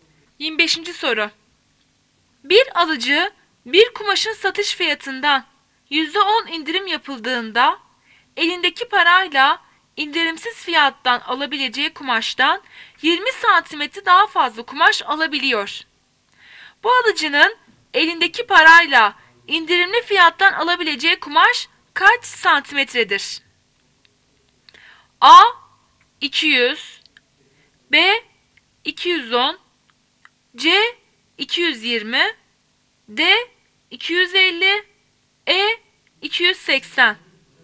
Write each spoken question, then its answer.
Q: Bu alıcının elindeki parayla indirimli fiyattan alabileceği kumaş kaç santimetredir?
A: Cevap A 200.